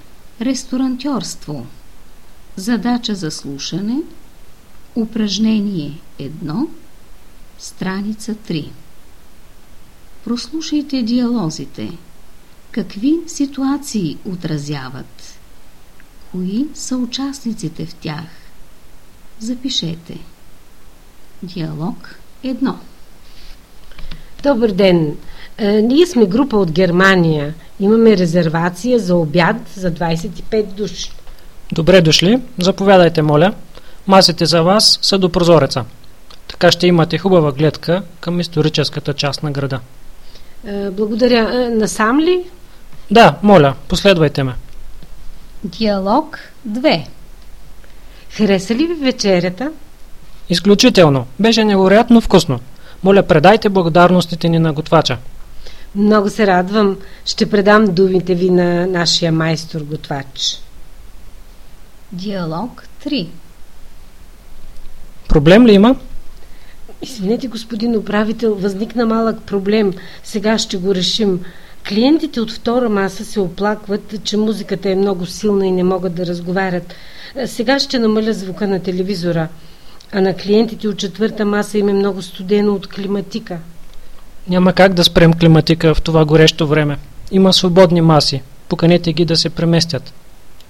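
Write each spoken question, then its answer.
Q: Какви ситуации отразяват?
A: 1: посрещане на група с резервация за обяд в ресторант; 2: гостите хвалят вечерята; 3: решаване на оплаквания на клиенти (силна музика, студено от климатика)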